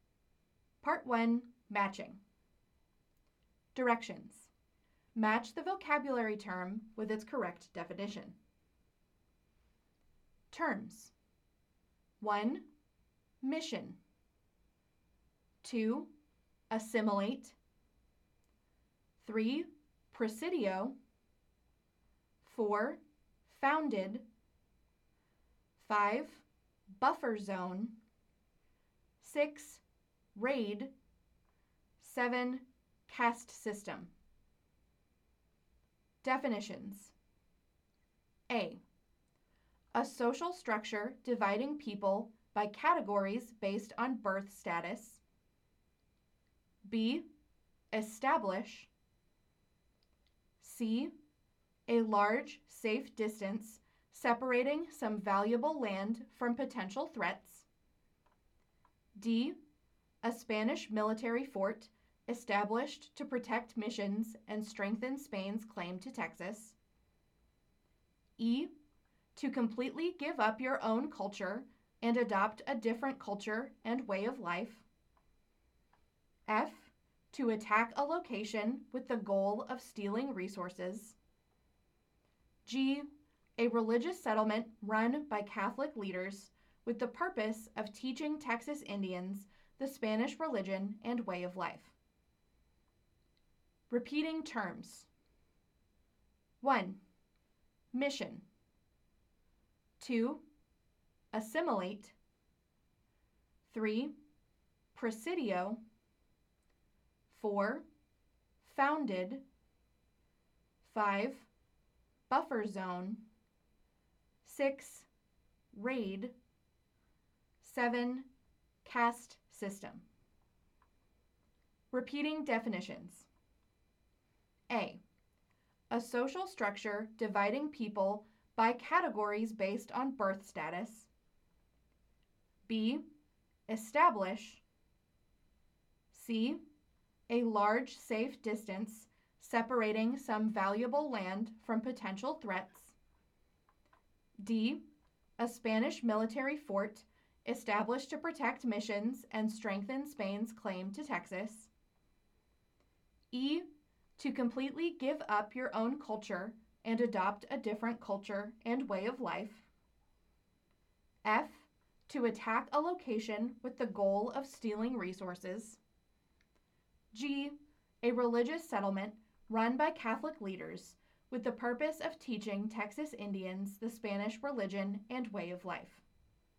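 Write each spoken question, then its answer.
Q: Mission.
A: G: A religious settlement run by Catholic leaders with the purpose of teaching Texas Indians the Spanish religion and way of life.

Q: Assimilate.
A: E: To completely give up your own culture and adopt a different culture and way of life.

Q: Presidio.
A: D: A Spanish military fort established to protect missions and strengthen Spain's claim to Texas.

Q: Founded.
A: B: Establish.

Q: Buffer zone.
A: C: A large, safe distance separating some valuable land from potential threats.

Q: Raid.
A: F: To attack a location with the goal of stealing resources.

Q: Caste system.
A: A: A social structure dividing people by categories based on birth status.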